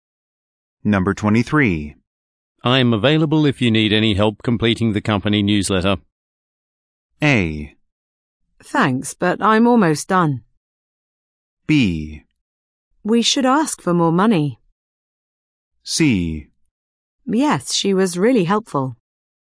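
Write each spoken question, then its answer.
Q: I'm available if you need any help completing the company newsletter.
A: A: Thanks, but I'm almost done.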